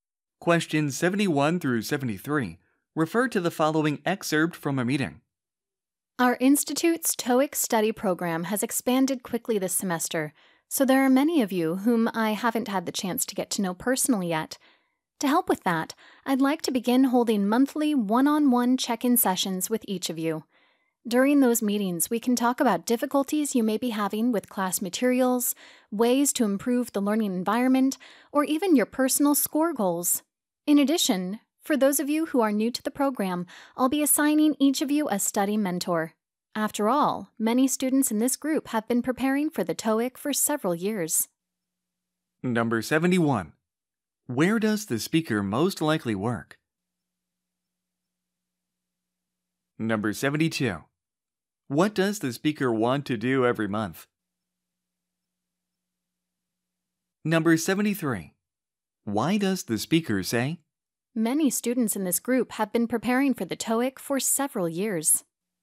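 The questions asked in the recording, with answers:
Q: Where does the speaker most likely work?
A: At a language institute (TOEIC study program)

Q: What does the speaker want to do every month?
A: Hold one-on-one check-in sessions with each student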